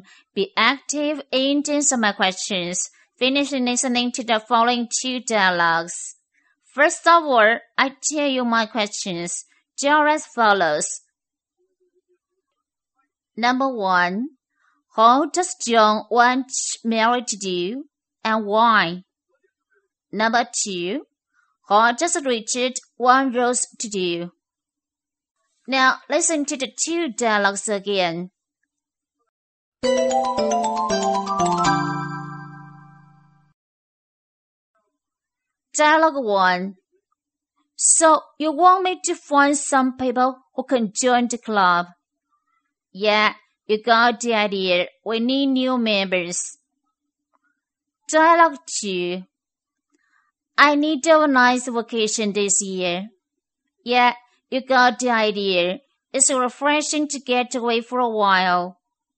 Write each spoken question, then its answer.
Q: how does John want Mary to do and why?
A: John asks Mary to find some friends to join the club because it needs new members.